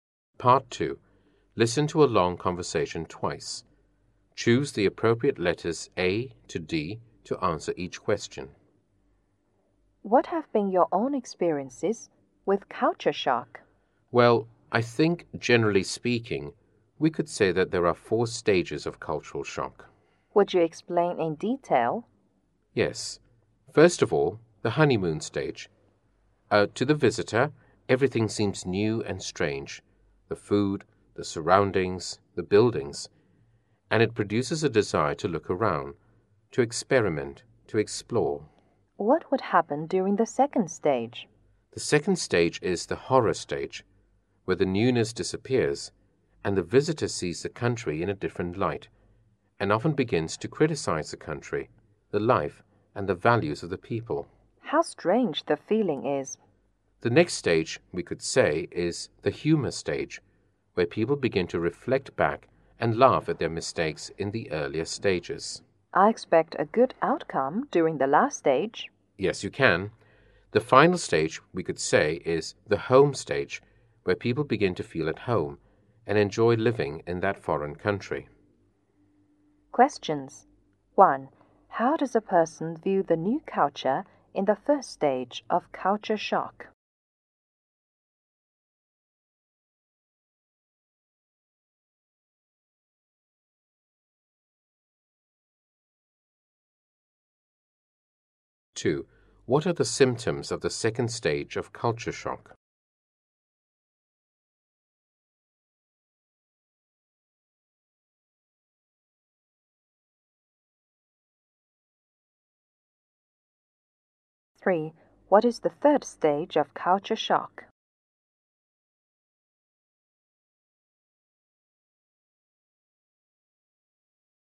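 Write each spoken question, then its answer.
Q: How does a person view the new culture in the first stage of culture shock?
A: Everything seems new and strange, and he wants to explore it

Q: What are the symptoms of the second stage of culture shock?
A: The newness disappears and the visitor criticizes the country, its life and its values

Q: What is the third stage of culture shock?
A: The humor stage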